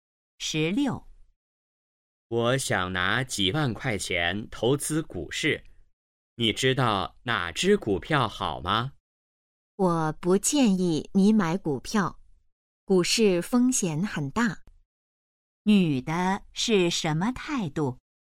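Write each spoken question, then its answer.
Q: 女的是什么态度?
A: 不建议买股票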